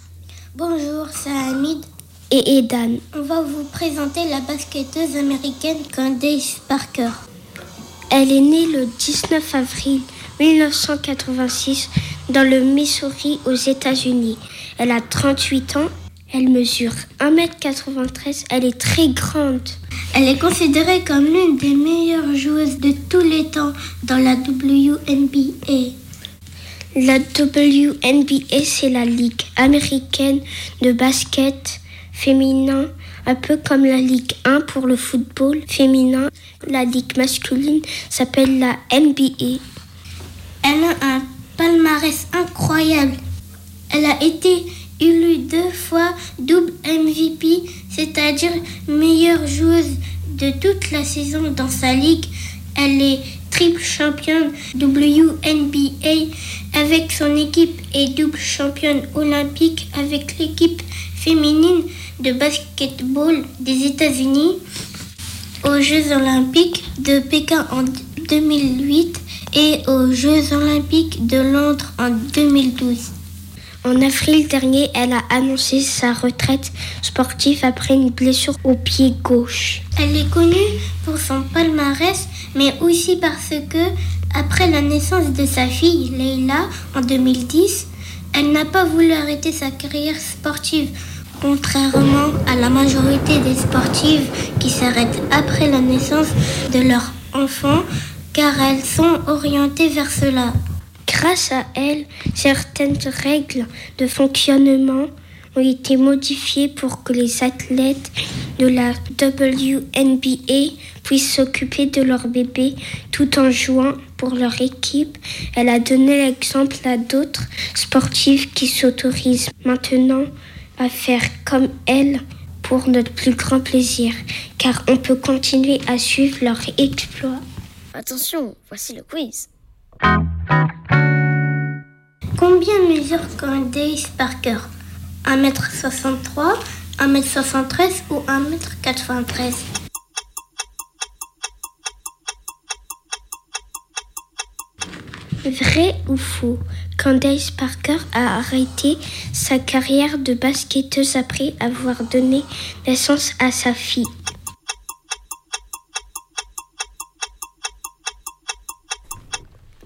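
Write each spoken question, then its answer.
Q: Combien mesure Candace Parker ?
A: 1m93

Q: Vrai ou faux, Candace Parker a arrêté sa carrière de basketteuse après avoir donné naissance à sa fille.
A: Faux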